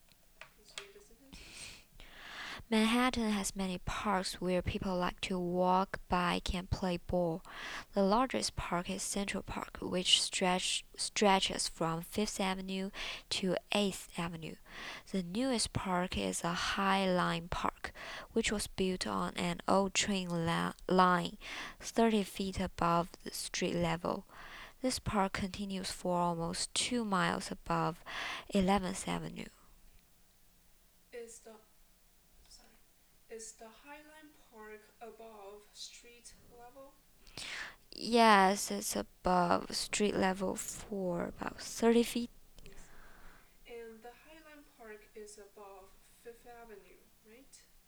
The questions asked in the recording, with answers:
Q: Yes. And the High Line Park is above 5th Avenue, right?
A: It's above 11th Avenue.